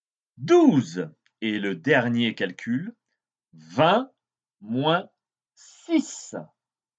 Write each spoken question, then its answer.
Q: 20 moins 6.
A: Tu vois pour 20 moins 6, par exemple, tu trouves 14.